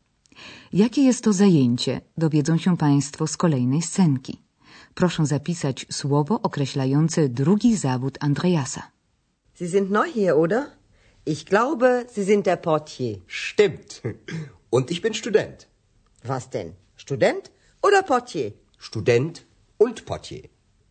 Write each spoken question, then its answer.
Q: Proszę zapisać słowo określające drugi zawód Andreasa.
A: portier, portier, recepcjonista